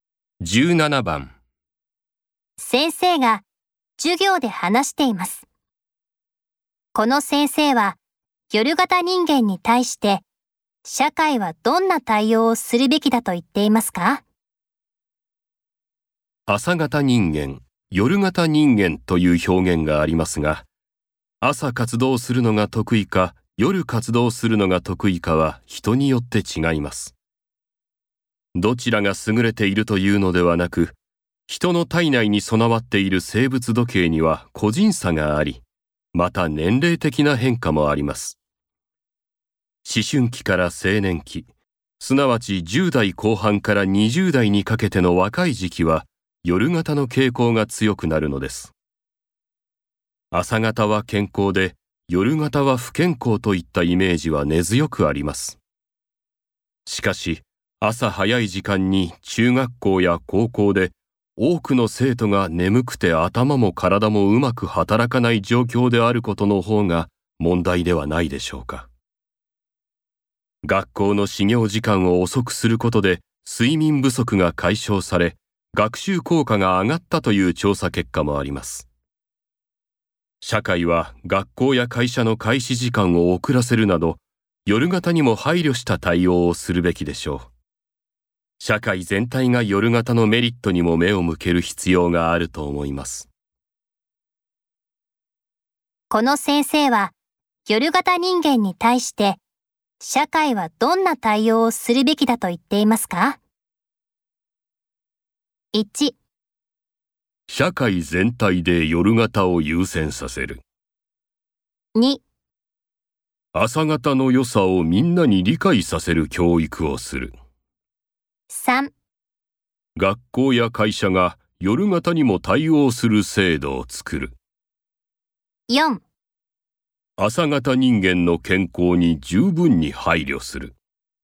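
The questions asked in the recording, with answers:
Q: この先生は、夜型人間に対して、社会はどんな対応をするべきだと言っていますか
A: 3: 学校や会社が夜型にも対応する制度を作る。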